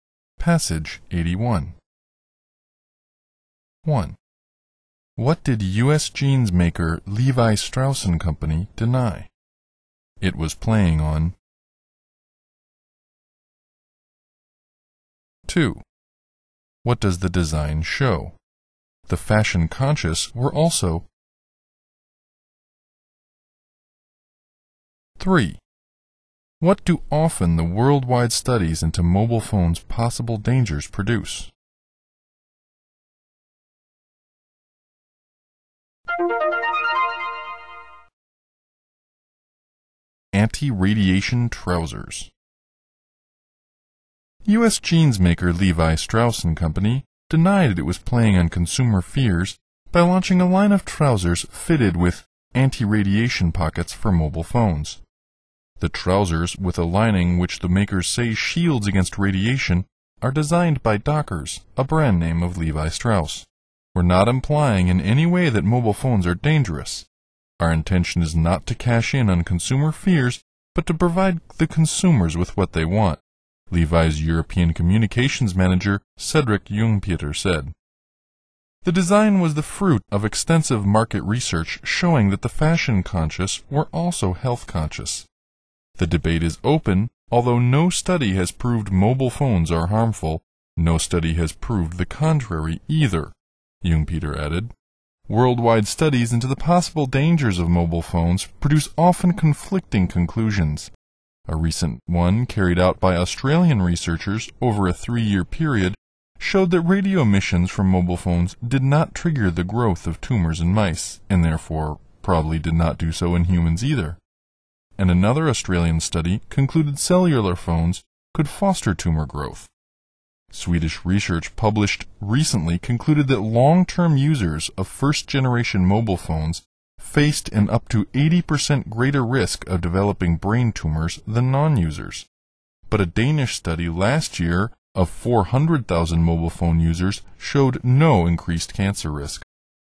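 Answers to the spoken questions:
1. That it was playing on consumer fears by launching anti-radiation trousers
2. That the fashion conscious were also health conscious
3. Conflicting conclusions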